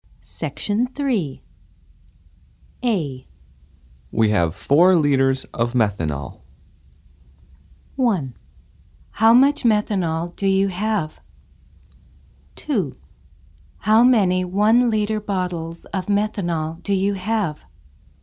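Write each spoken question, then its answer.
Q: How much methanol do you have?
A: 4 liters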